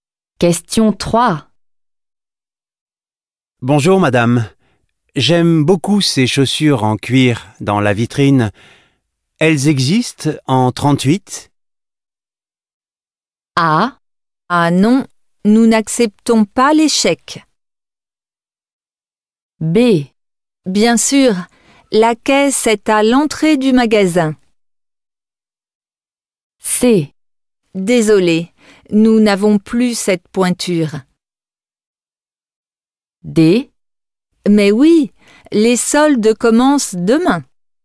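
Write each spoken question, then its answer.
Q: Elles existent en 38?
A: C: Désolé, nous n'avons plus cette pointure.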